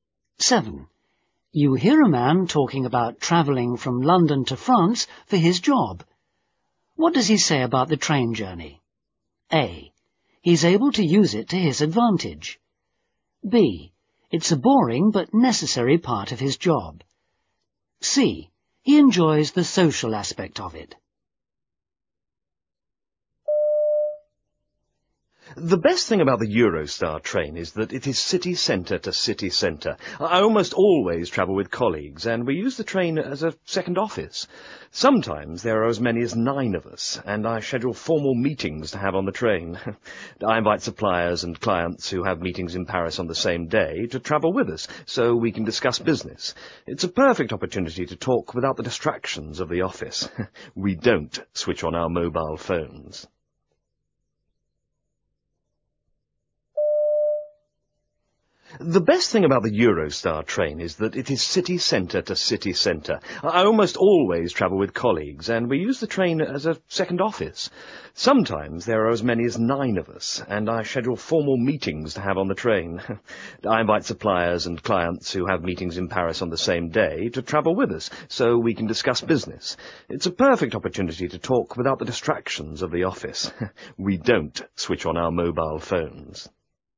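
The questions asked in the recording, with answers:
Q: What does he say about the train journey?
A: A: He's able to use it to his advantage.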